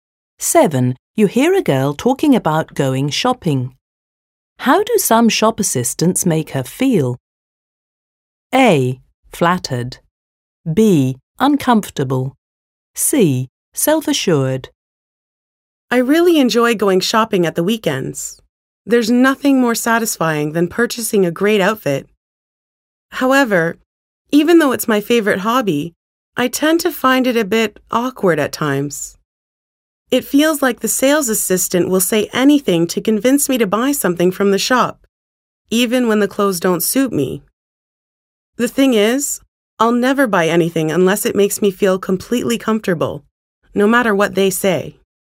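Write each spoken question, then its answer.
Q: How do some shop assistants make her feel?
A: B: Uncomfortable.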